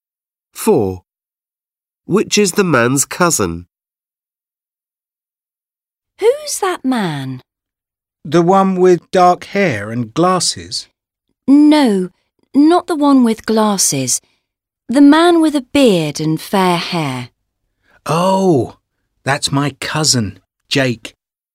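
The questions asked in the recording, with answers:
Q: Which is the man's cousin?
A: the man with a beard and fair hair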